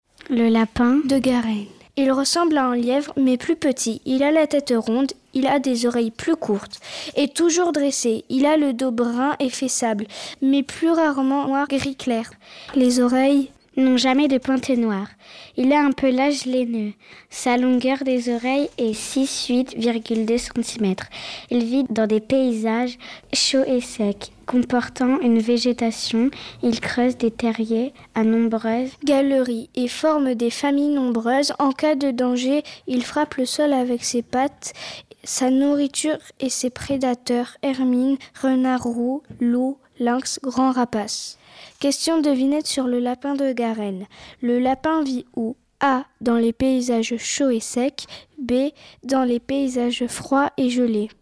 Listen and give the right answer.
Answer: Réponse : dans les paysages chauds et secs.